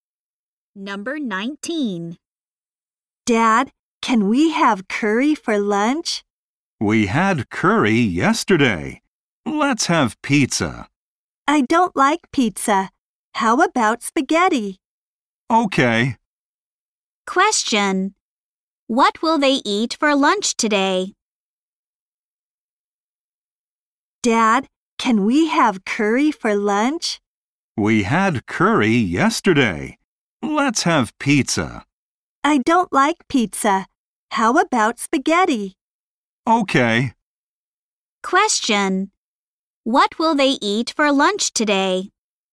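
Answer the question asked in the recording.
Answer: Spaghetti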